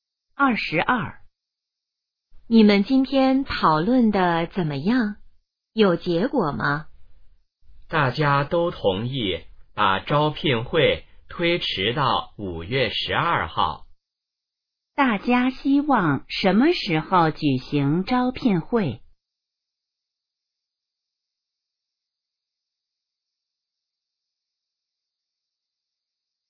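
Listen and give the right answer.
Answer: 5月12号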